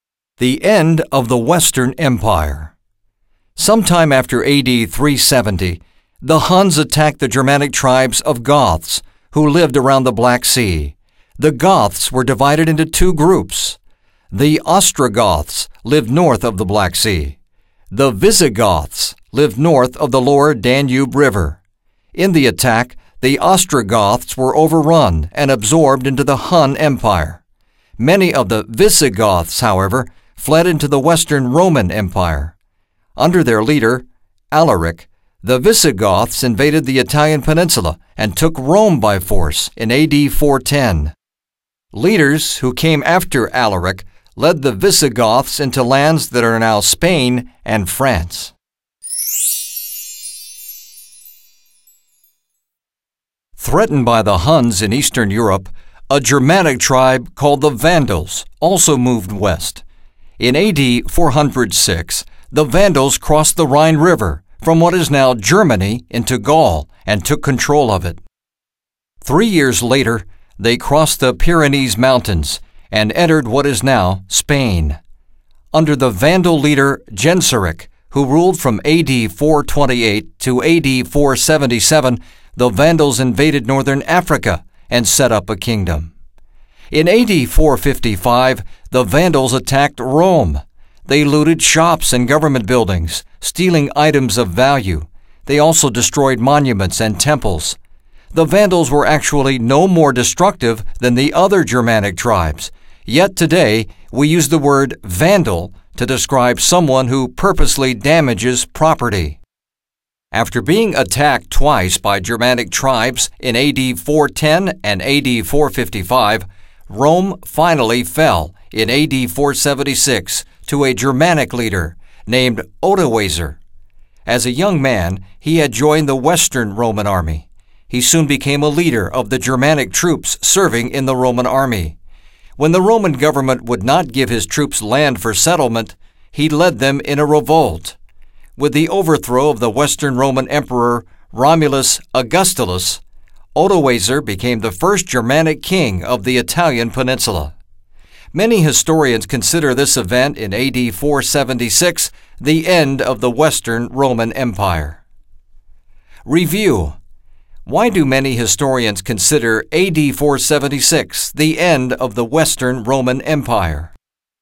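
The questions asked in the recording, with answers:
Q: Why do many historians consider AD 476 the end of the Western Roman Empire?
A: Odoacer overthrew Emperor Romulus Augustulus and became the first Germanic king of the Italian peninsula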